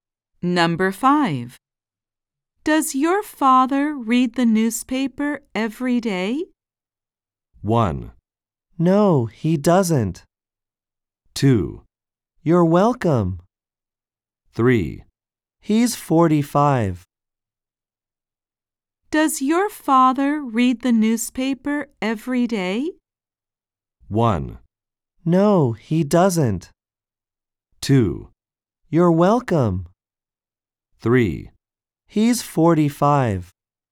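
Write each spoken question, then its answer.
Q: Does your father read the newspaper every day?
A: 1: No, he doesn't.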